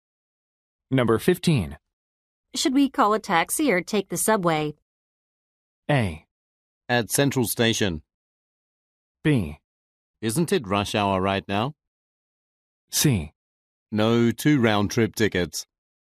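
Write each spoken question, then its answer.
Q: Should we call a taxi or take the subway?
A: B: Isn't it rush hour right now?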